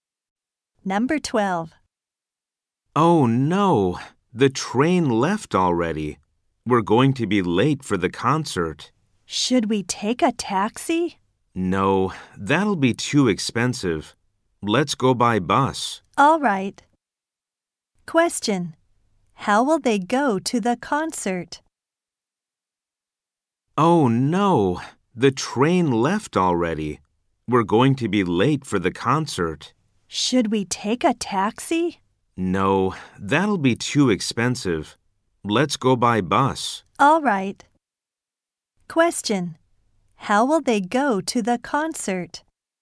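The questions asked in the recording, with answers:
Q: How will they go to the concert?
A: By bus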